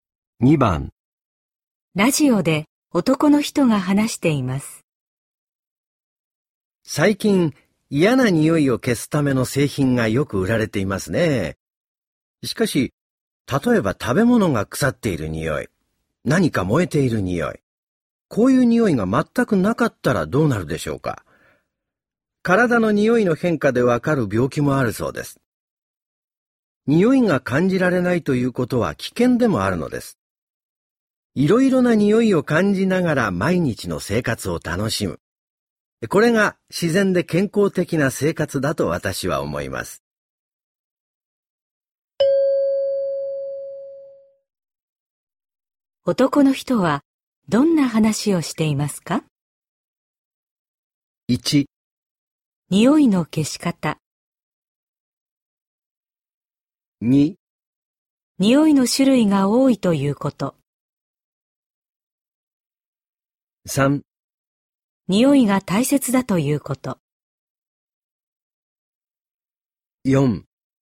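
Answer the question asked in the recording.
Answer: 3: 匂いが大切だということ。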